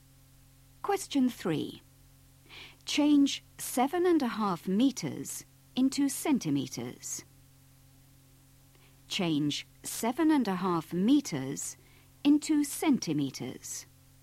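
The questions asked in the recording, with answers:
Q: Change 7.5 meters into centimeters.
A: 750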